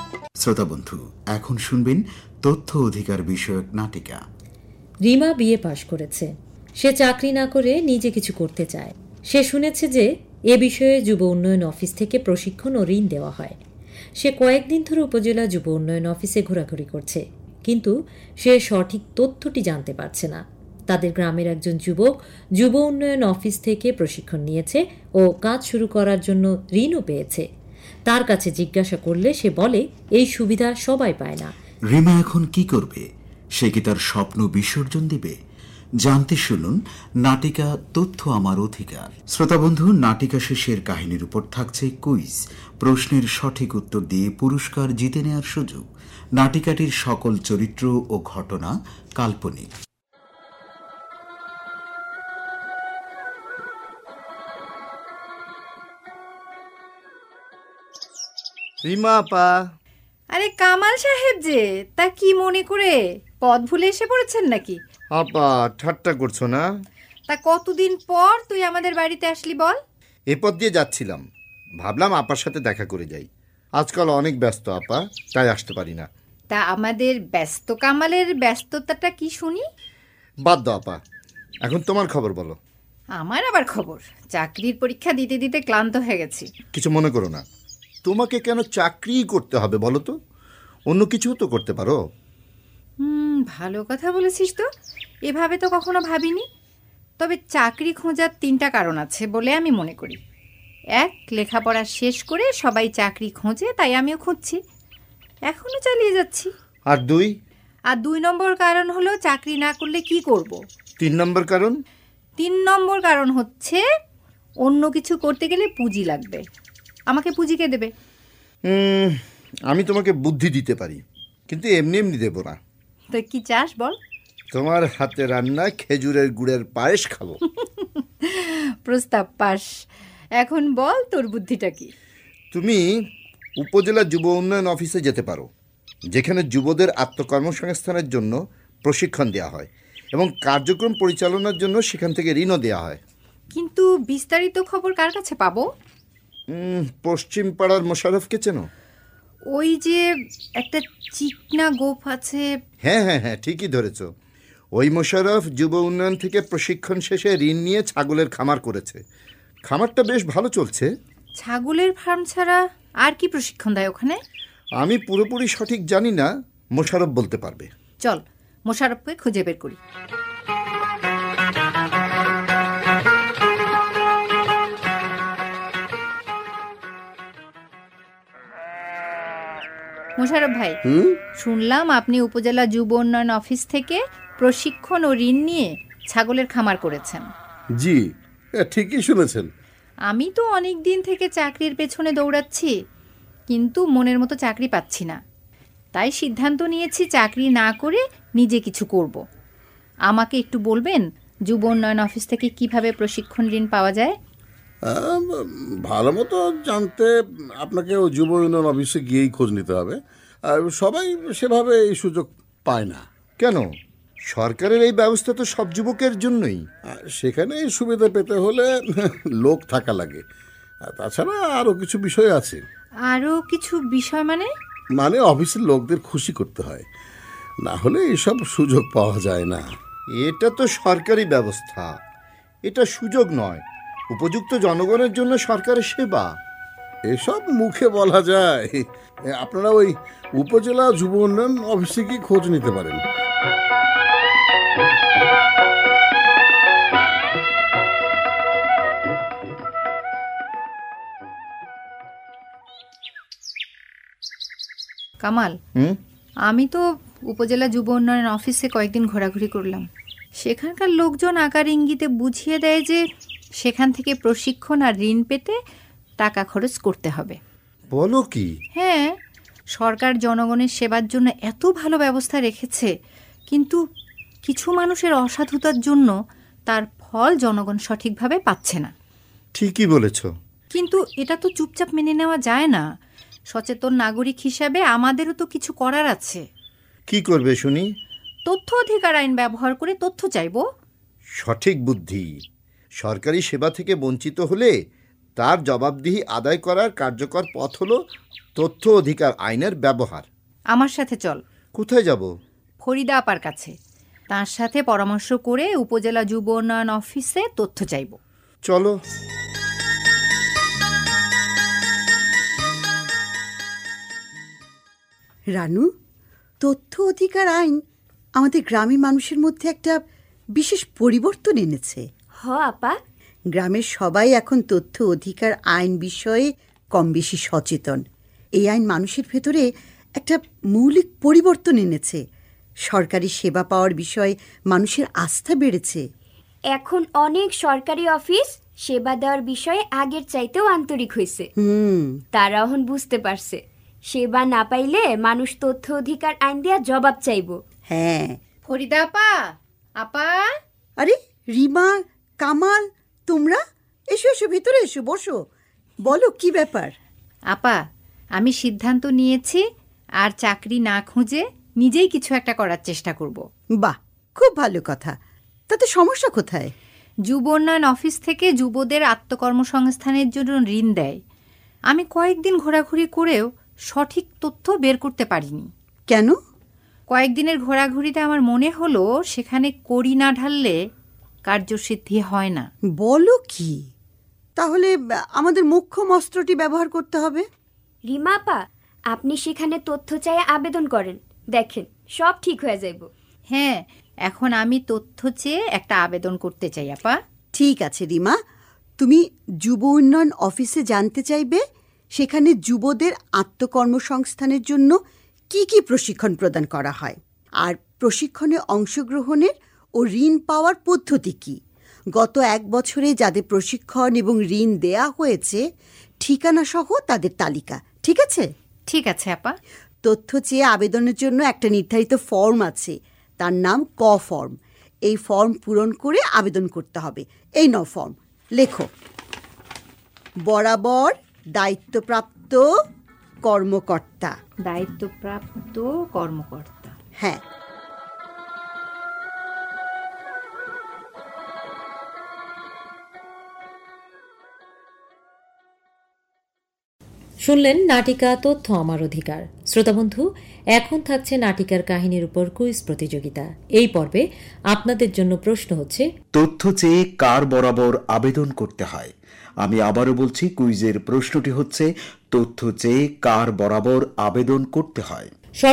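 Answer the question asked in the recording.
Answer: দায়িত্বপ্রাপ্ত কর্মকর্তা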